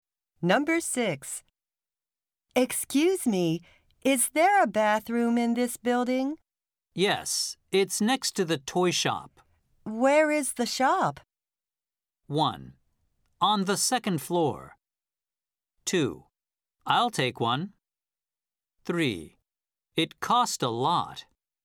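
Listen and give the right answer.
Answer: 1: On the second floor.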